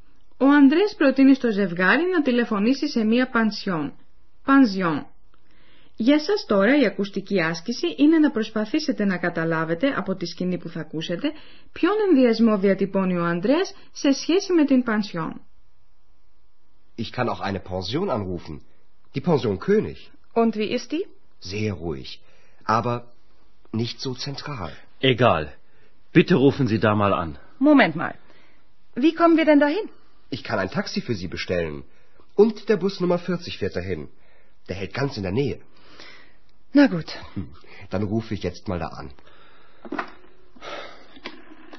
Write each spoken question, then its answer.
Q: Για σας τώρα η ακουστική άσκηση είναι να προσπαθήσετε να καταλάβετε από τη σκηνή που θα ακούσετε ποιον ενδιασμό διατυπώνει ο Ανδρέας σε σχέση με την πανσιόν.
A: Ο Ανδρέας λέει πως στην πανσιόν έχει ησυχία, αλλά δεν βρίσκεται τόσο κοντά στο κέντρο.